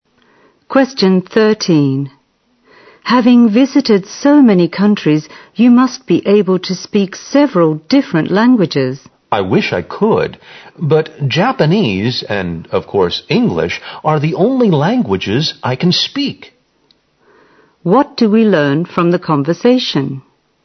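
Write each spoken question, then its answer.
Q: What do we learn from the conversation?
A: The speaker can speak only two languages: Japanese and English.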